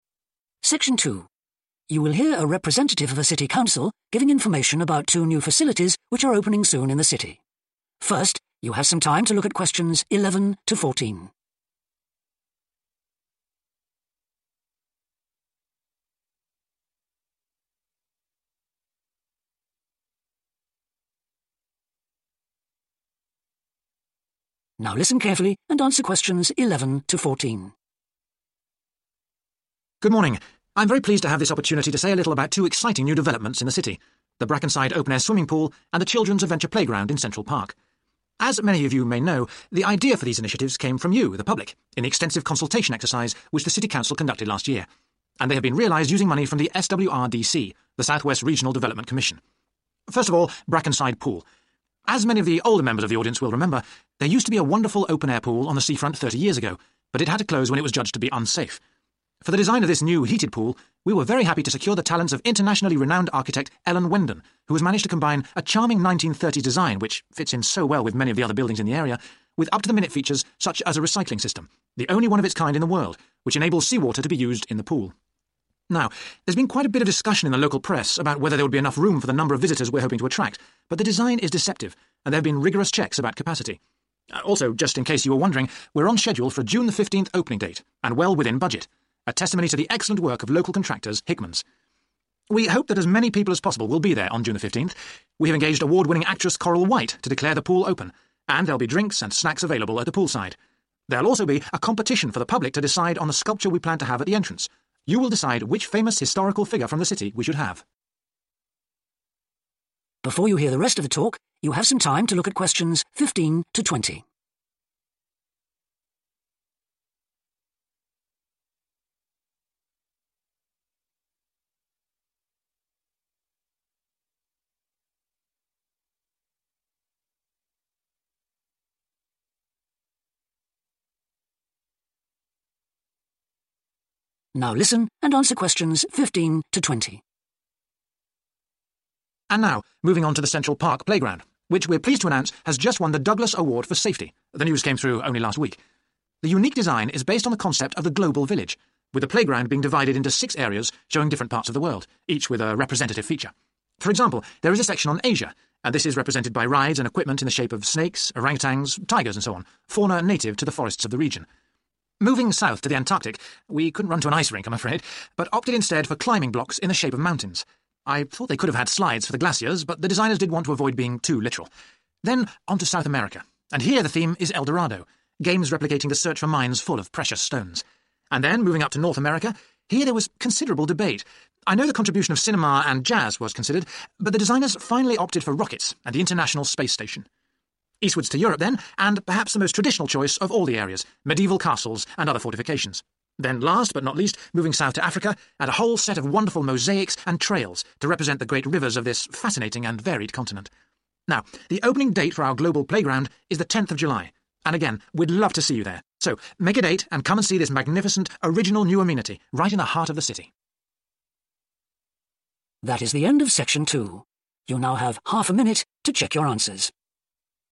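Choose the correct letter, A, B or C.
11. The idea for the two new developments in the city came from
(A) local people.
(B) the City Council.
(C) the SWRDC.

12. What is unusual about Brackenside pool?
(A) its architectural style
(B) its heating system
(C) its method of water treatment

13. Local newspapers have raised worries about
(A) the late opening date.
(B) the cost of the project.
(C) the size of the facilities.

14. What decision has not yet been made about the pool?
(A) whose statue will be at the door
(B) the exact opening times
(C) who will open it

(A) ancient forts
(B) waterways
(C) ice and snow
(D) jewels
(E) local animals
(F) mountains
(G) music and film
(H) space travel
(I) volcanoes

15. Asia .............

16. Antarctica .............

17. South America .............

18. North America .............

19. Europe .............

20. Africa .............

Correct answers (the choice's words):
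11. local people.
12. its method of water treatment
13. the size of the facilities.
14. whose statue will be at the door
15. local animals
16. mountains
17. jewels
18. space travel
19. ancient forts
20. waterways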